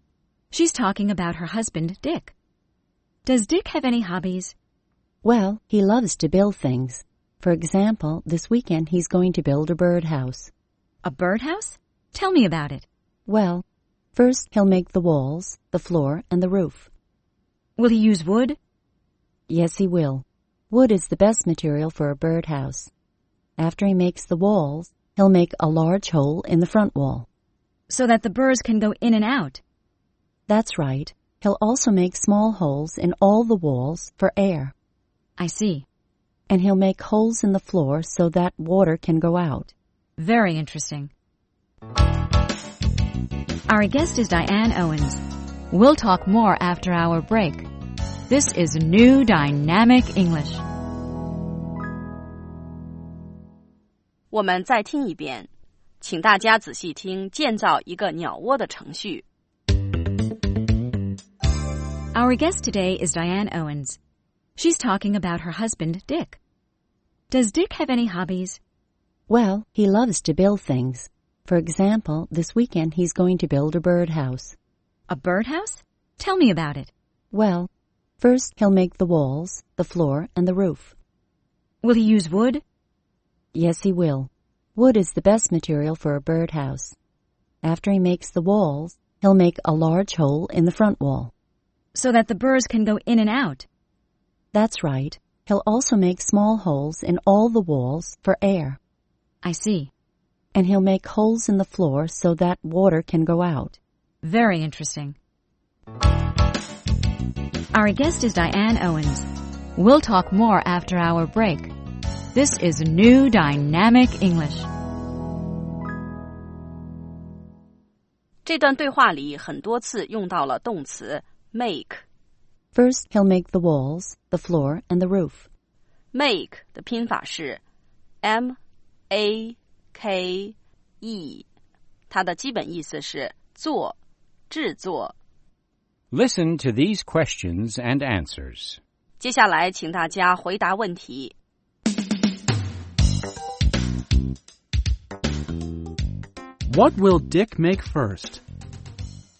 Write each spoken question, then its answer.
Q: What will Dick make first?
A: First,He'll make the walls, the floor, and the roof.